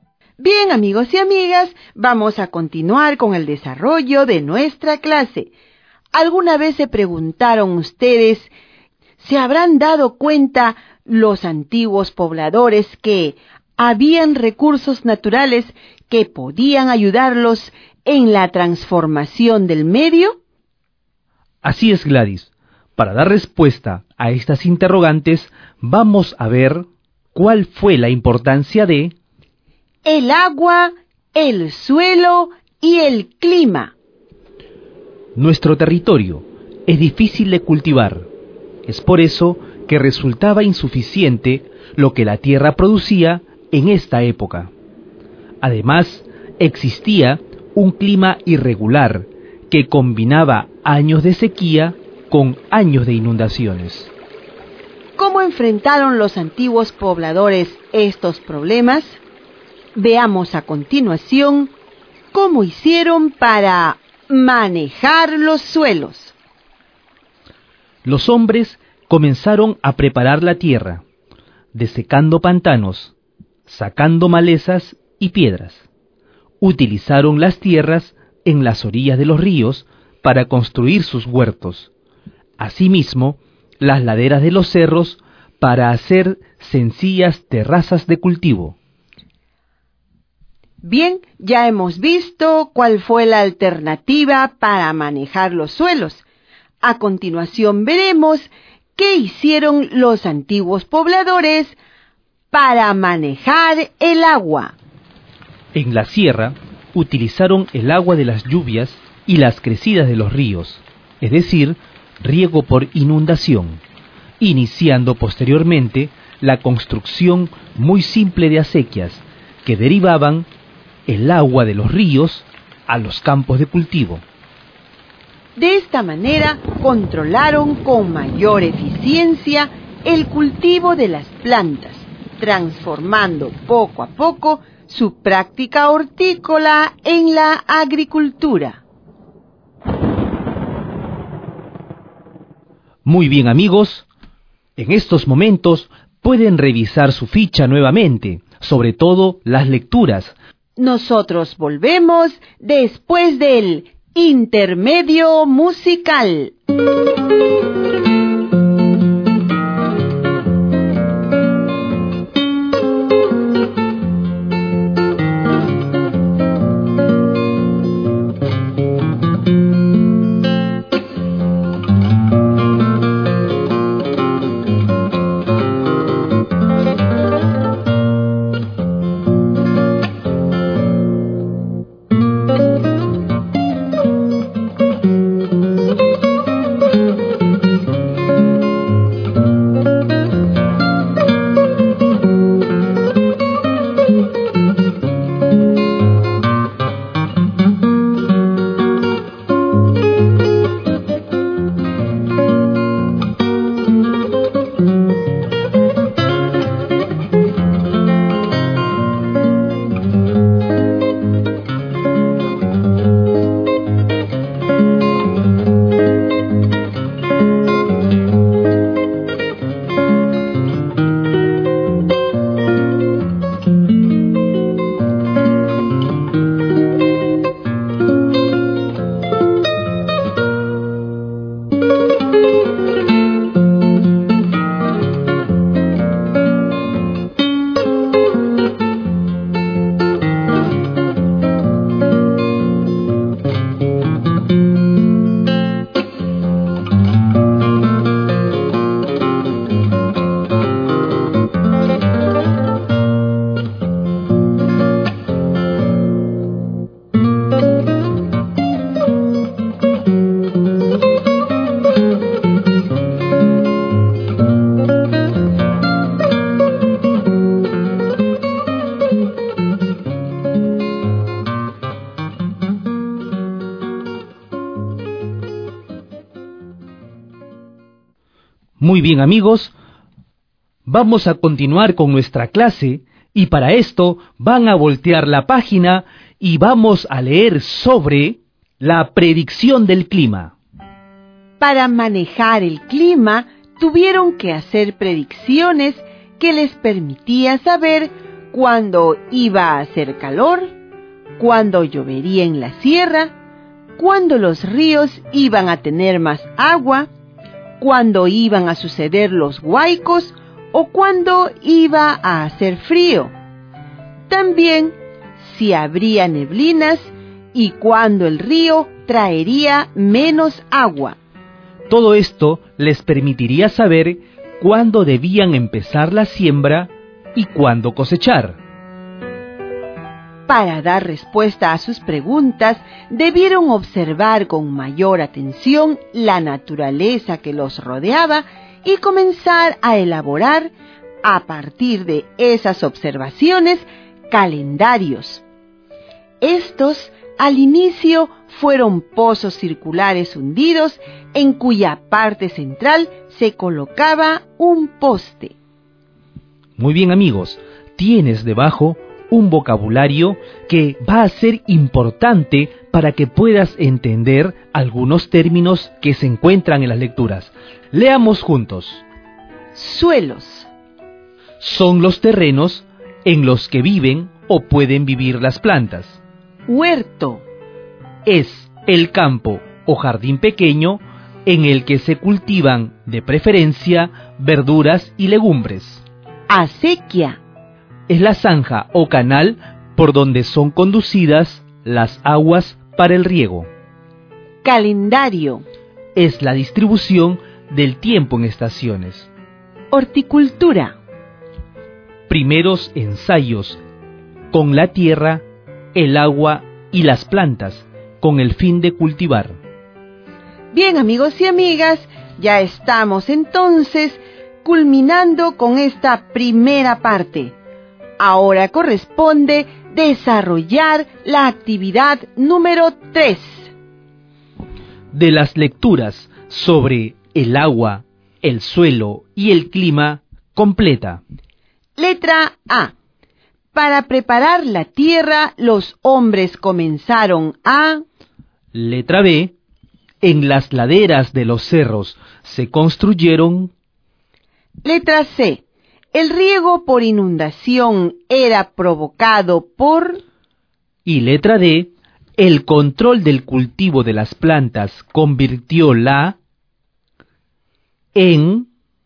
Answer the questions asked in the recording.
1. desecar pantanos, sacar la maleza y piedras.
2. sencillas terrazas de cultivo.
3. el agua de las lluvias y las crecidas de los ríos.
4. horticultura en... agricultura.